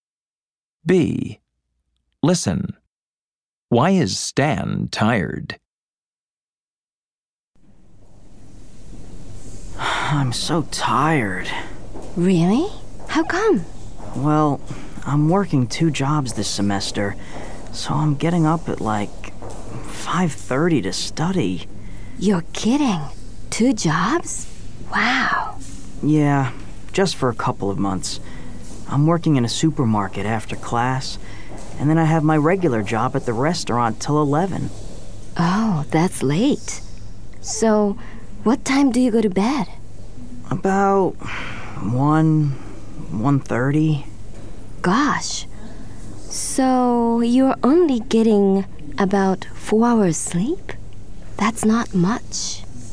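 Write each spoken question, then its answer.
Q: Why is Stan tired?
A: He's working two jobs, so he gets up at 5:30 and only sleeps about 4 hours.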